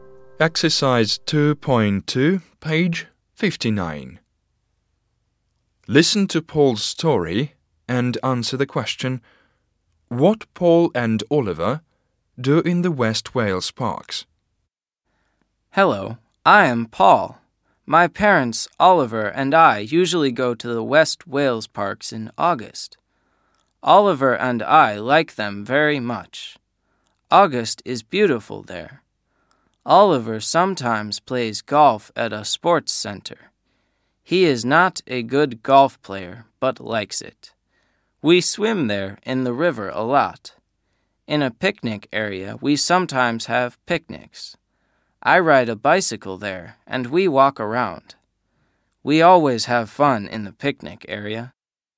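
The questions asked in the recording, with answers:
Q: what Paul and Oliver do in the West Wales parks?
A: They swim in the river, have picnics, ride bicycles and walk around; Oliver sometimes plays golf.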